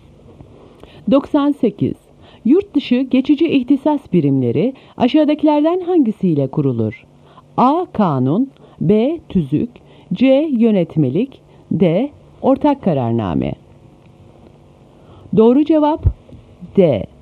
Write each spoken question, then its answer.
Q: Yurt dışı geçici ihtisas birimleri aşağıdakilerden hangisiyle kurulur?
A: Doğru cevap D.